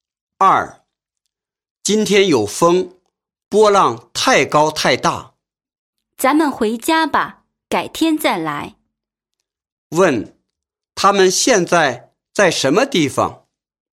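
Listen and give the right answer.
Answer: 海边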